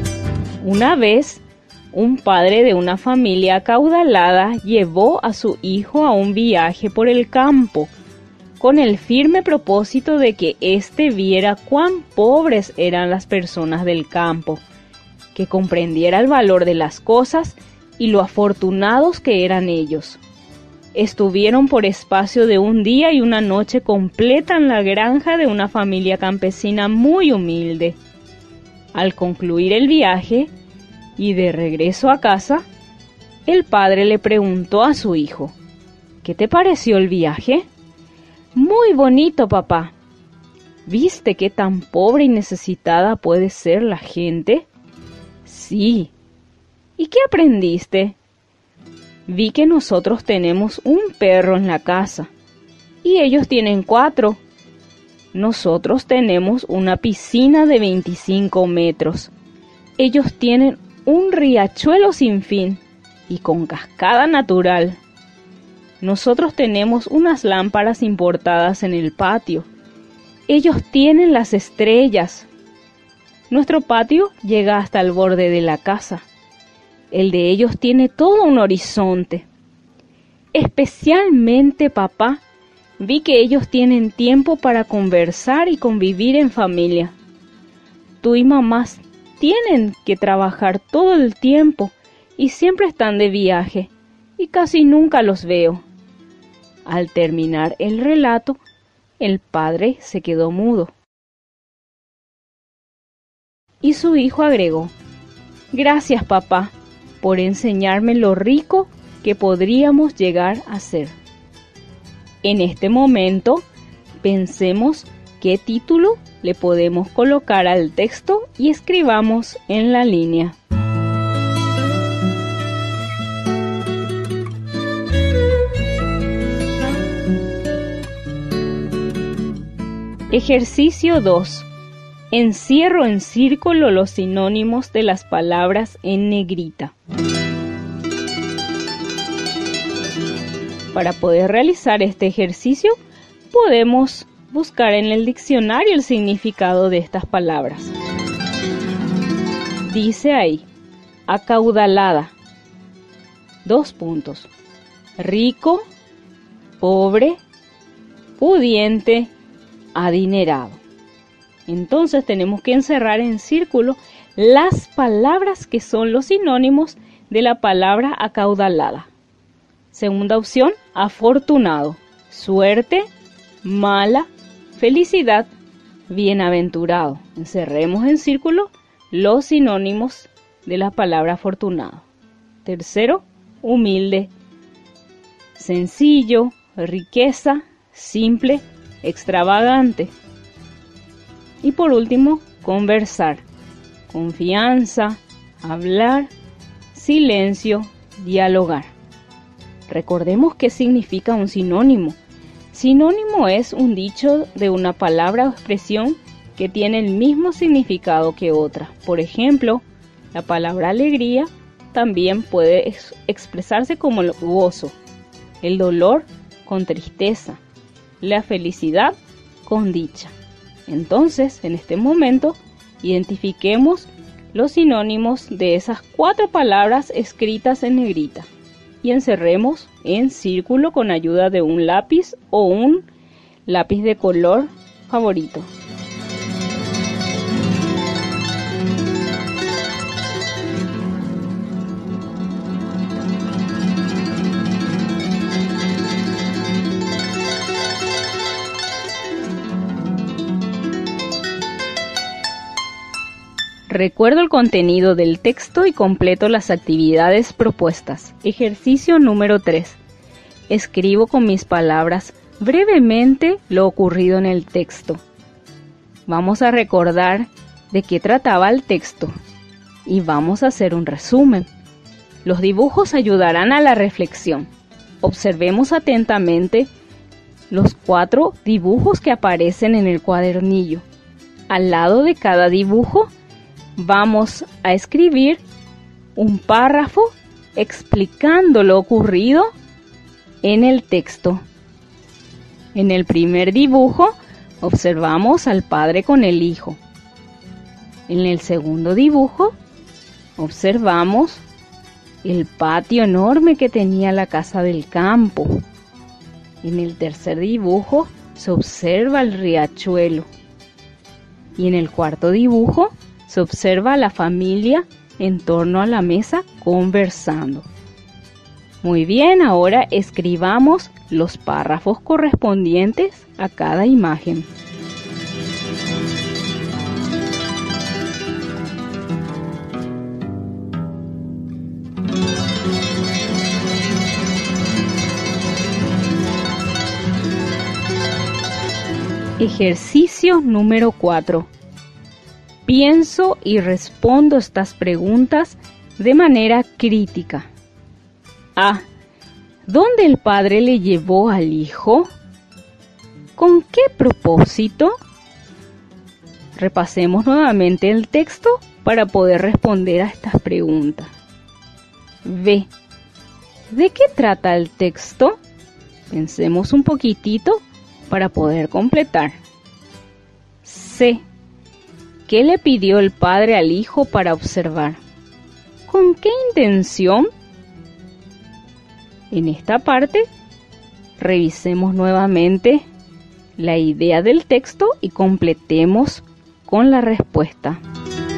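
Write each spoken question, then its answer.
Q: ¿Dónde el padre le llevó al hijo?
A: De viaje por el campo, a la granja de una familia campesina muy humilde

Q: ¿Con qué propósito?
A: Para que viera cuán pobres eran las personas del campo, comprendiera el valor de las cosas y lo afortunados que eran ellos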